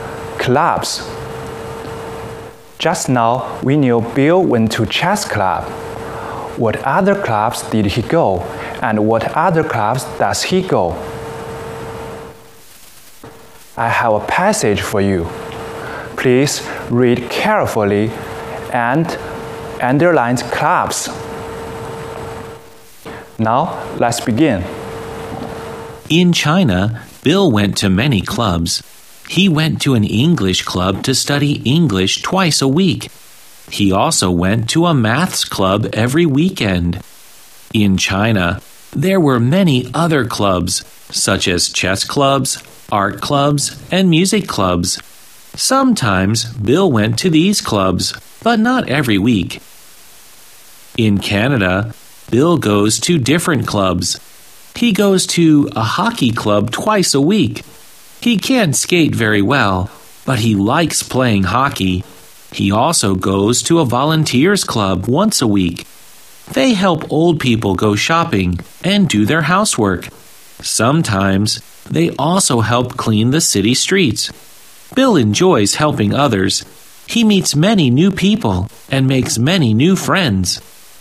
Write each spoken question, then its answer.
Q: What other clubs did he go and what other clubs does he go?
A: Bill went to chess club. And he also went to English club, art club, music club, and math club. Bill goes to hockey club and volunteers club.